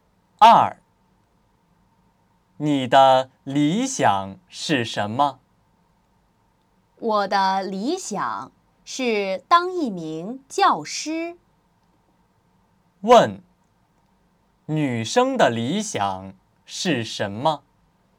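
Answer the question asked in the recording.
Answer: 当一名教师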